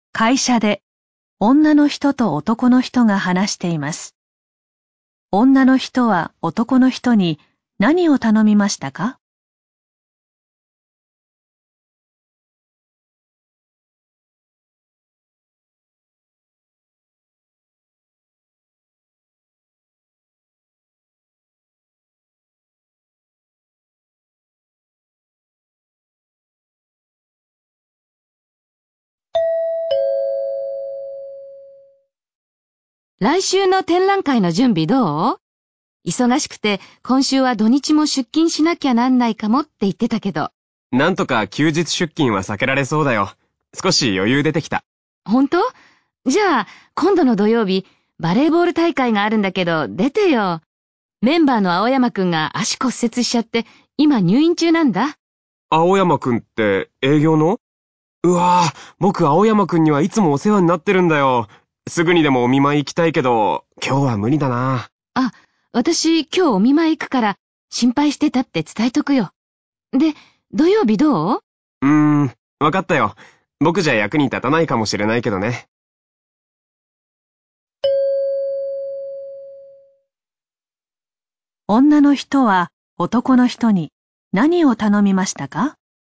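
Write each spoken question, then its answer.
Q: 女の人は男の人に何を頼みましたか?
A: 土曜日のバレーボール大会に出ること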